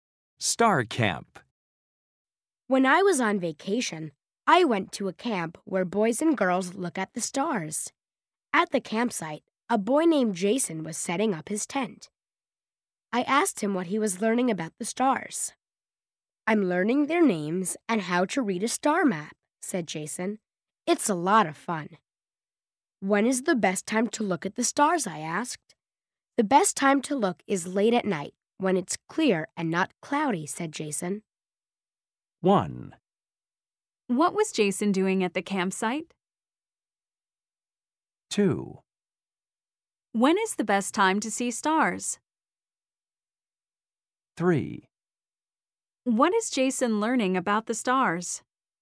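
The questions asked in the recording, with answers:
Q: What was Jason doing at the campsite?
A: Setting up his tent

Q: When is the best time to see stars?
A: Late at night, when it's clear and not cloudy

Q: What is Jason learning about the stars?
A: Their names and how to read a star map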